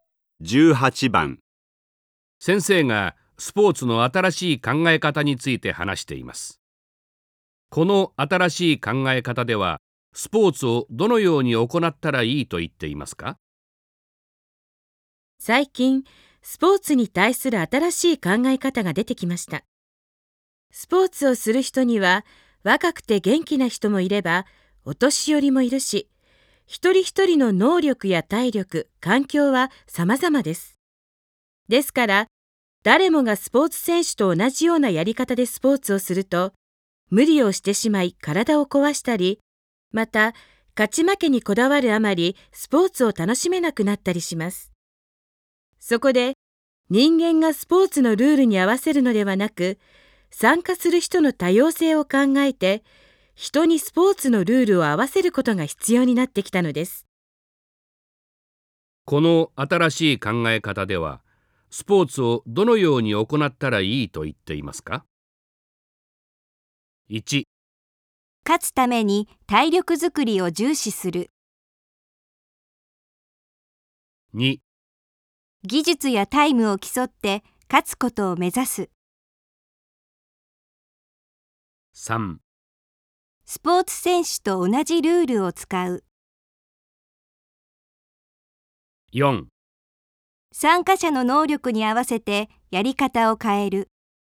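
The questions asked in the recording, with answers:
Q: この新しい考え方では、スポーツをどのように行ったらいいと言っていますか?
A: 4: 参加者の能力に合わせてやり方を変える。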